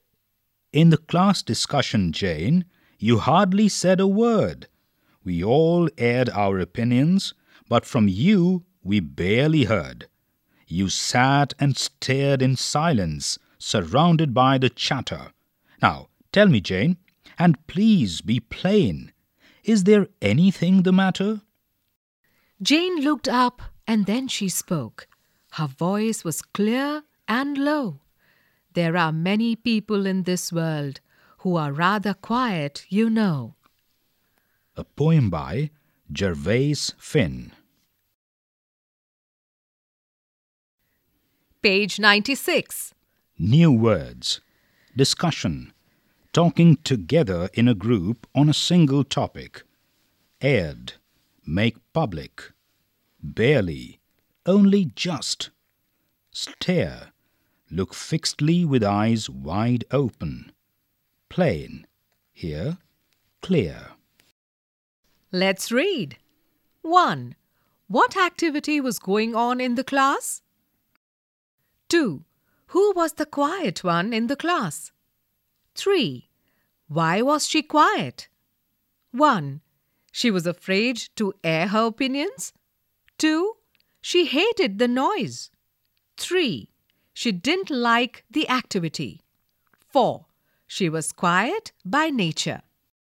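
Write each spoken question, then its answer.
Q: What activity was going on in the class?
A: A class discussion

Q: Who was the quiet one in the class?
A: Jane

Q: Why was she quiet?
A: 4: She was quiet by nature.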